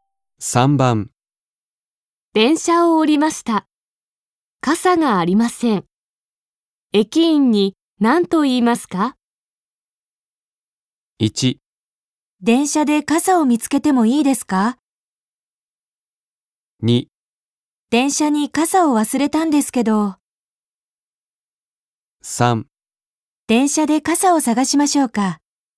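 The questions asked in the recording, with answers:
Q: 電車を降りました。傘がありません。駅員に何と言いますか?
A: 2: 電車に傘を忘れたんですけど。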